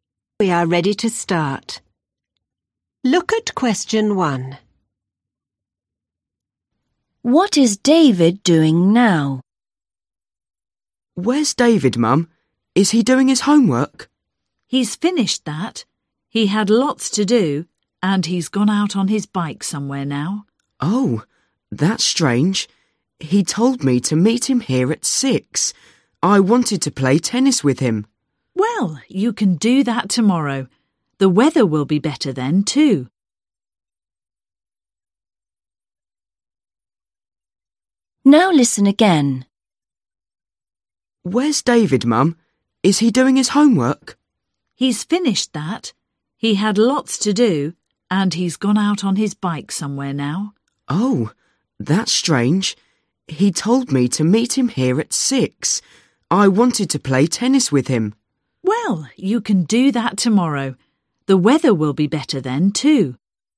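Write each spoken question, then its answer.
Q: What is David doing now?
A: riding his bike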